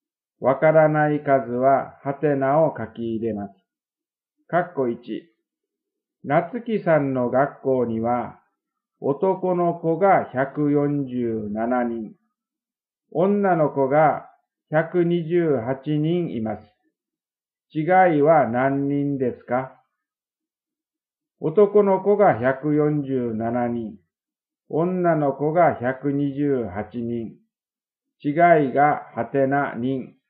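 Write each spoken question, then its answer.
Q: 違いは何人ですか?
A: 19人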